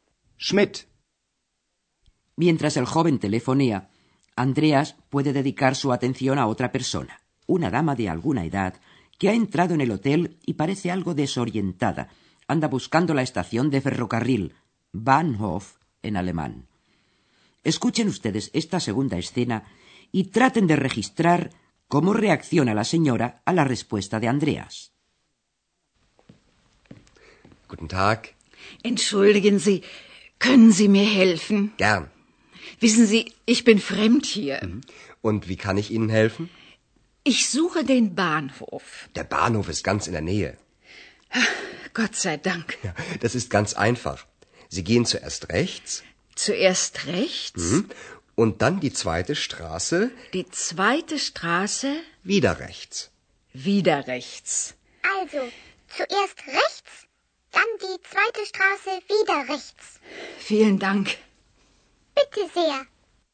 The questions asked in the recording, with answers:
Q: traten de registrar cómo reacciona la señora a la respuesta de Andreas.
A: La vieja señora reacciona aliviada ante la respuesta de Andreas y exclama, gracias a Dios.